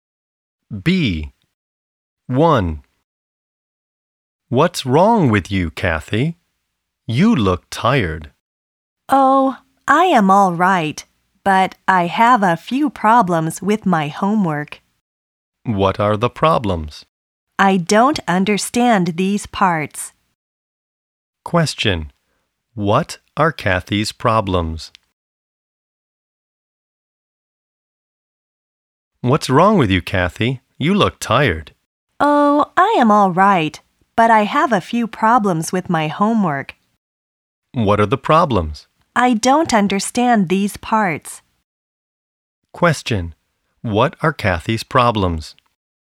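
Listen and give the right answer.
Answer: She has problems with her homework; she doesn't understand some parts.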